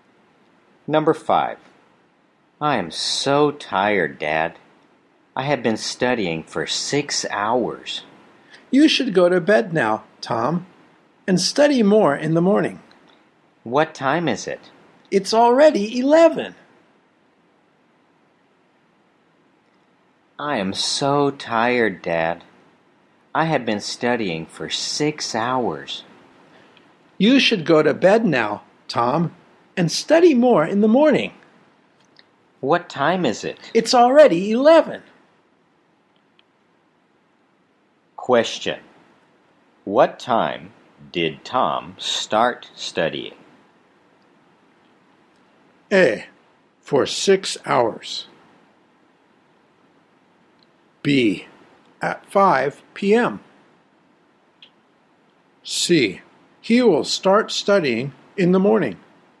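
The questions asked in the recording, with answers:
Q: What time did Tom start studying?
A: B: At 5 p.m.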